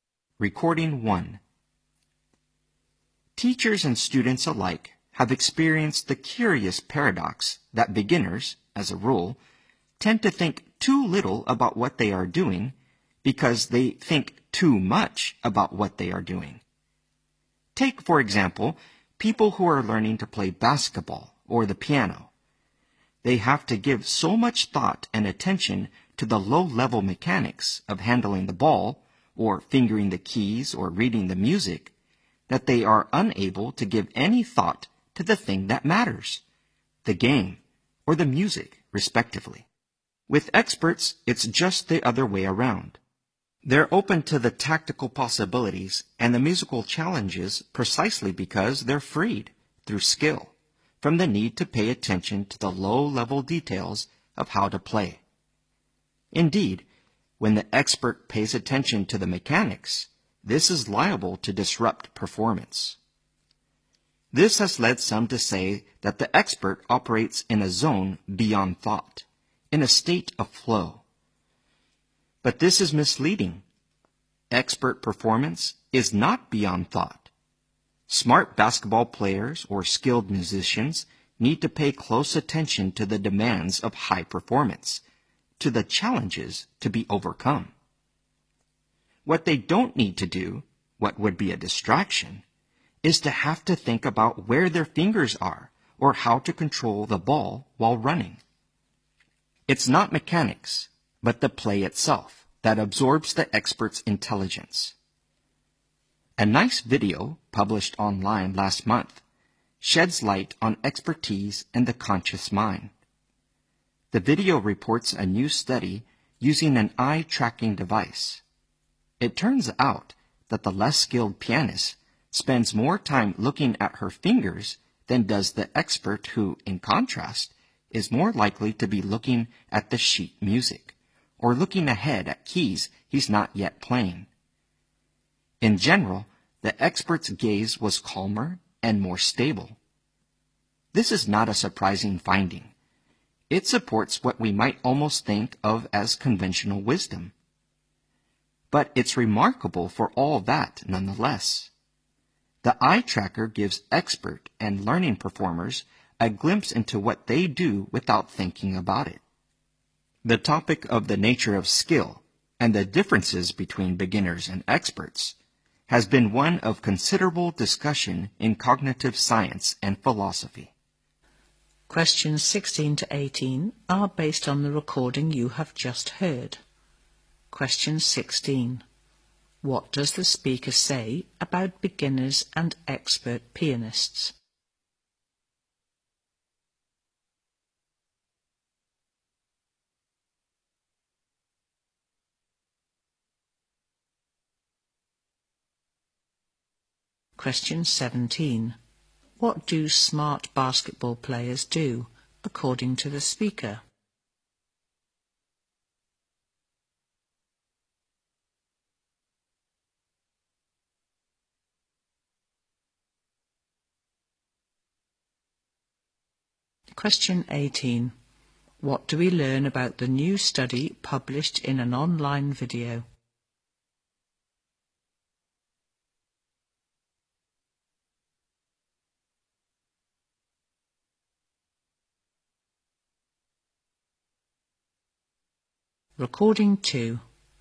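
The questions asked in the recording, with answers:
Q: What do smart basketball players do, according to the speaker?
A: Pay close attention to the demands of high performance

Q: What do we learn about the new study published in an online video?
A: It used an eye-tracking device and found experts look less at their fingers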